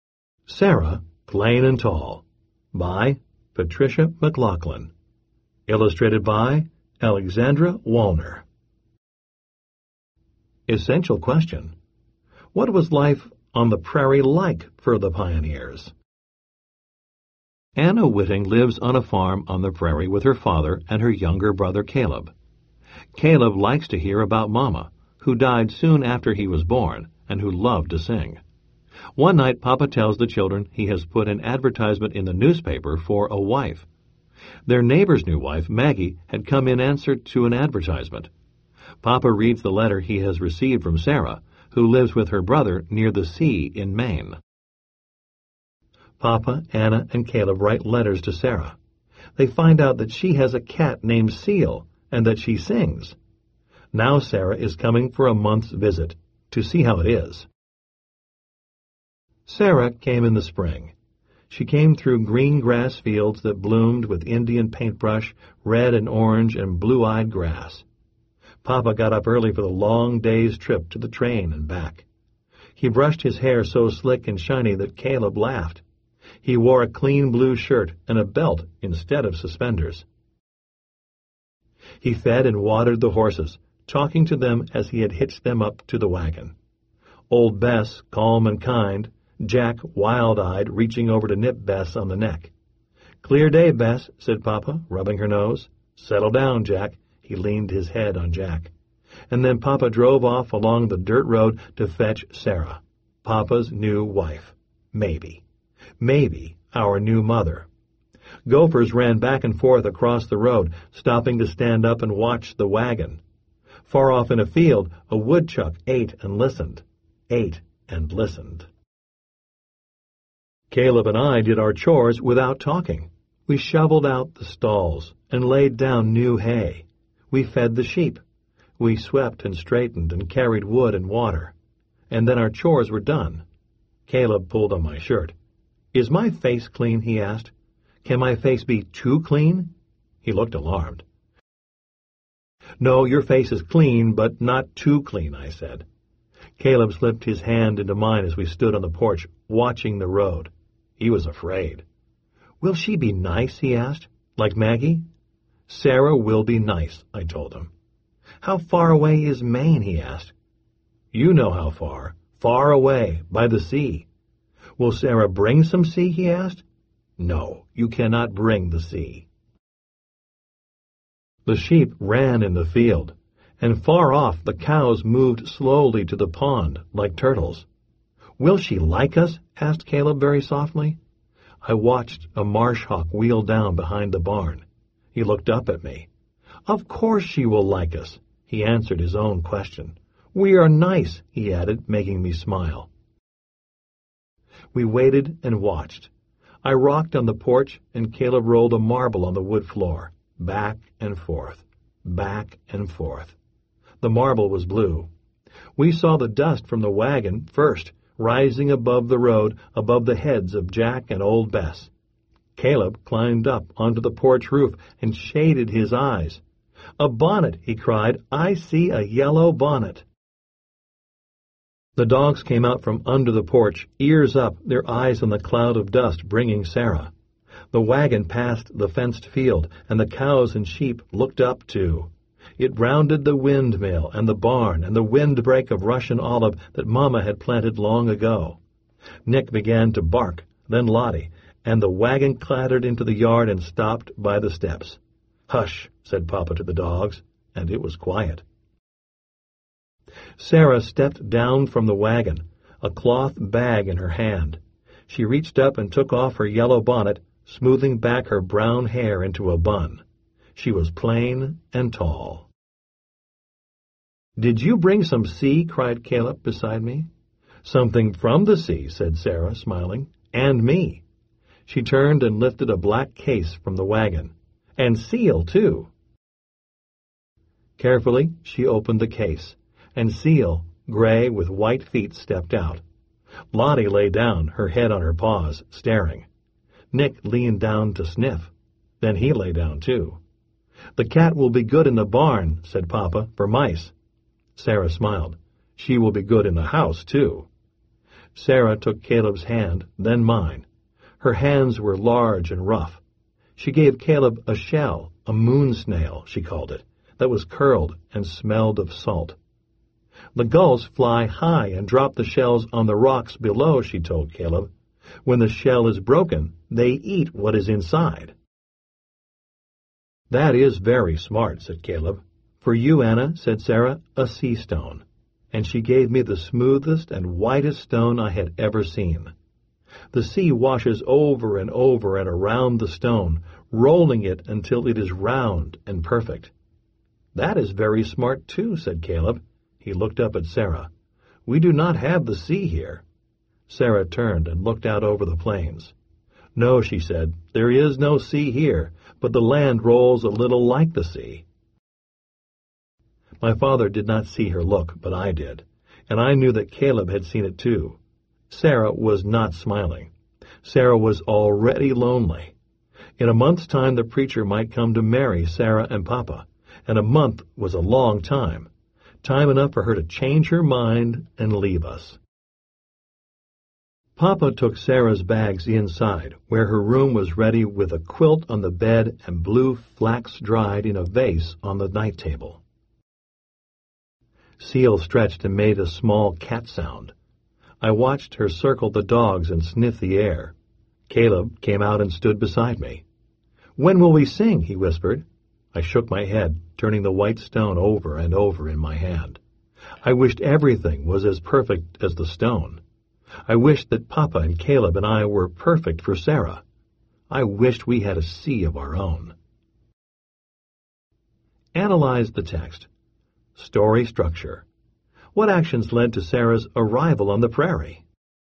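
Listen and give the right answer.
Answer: Papa put an advertisement for a wife in the newspaper; Sarah answered with a letter, the family wrote letters to her, and she came for a month's visit.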